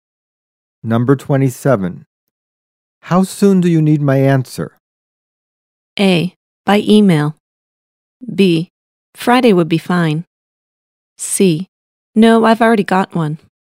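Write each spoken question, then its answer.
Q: How soon do you need my answer?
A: B: Friday would be fine.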